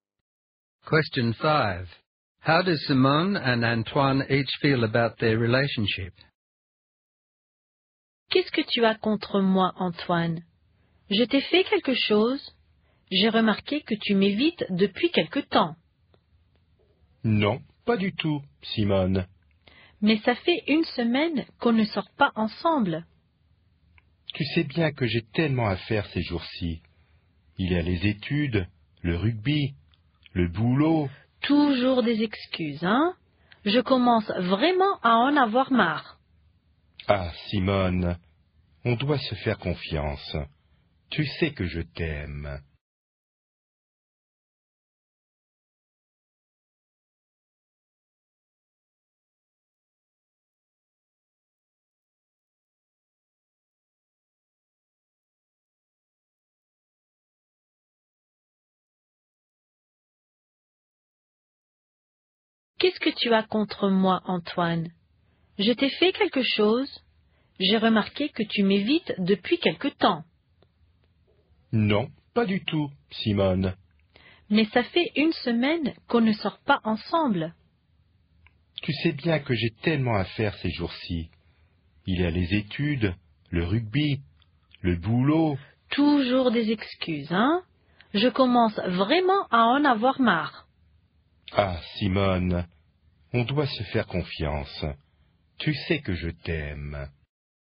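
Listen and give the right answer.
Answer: Simone feels neglected and fed up with his excuses; Antoine says he is just busy, loves her, and wants them to trust each other.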